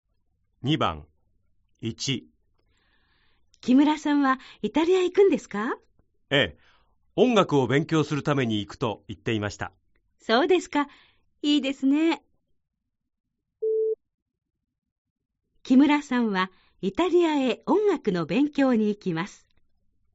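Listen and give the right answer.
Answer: ○(正しい)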